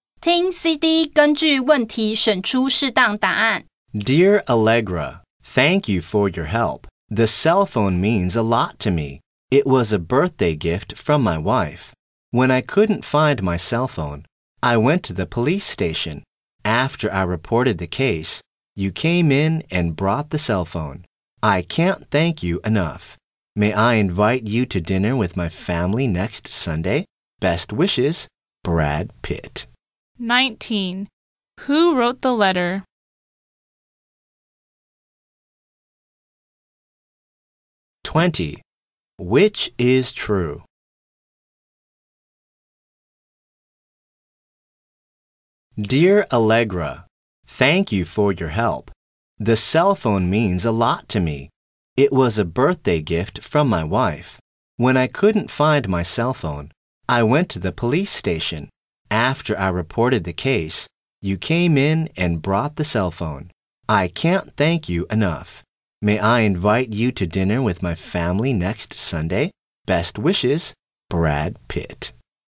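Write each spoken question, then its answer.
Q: Who wrote the letter?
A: Brad Pitt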